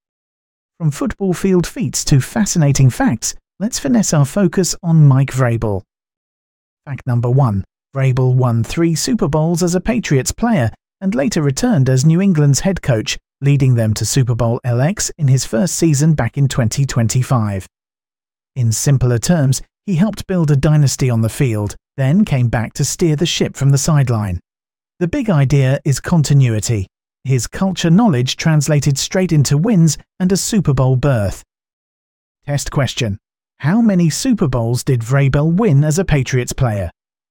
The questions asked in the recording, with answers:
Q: How many Super Bowls did Vrabel win as a Patriots player?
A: Correct answer, 3.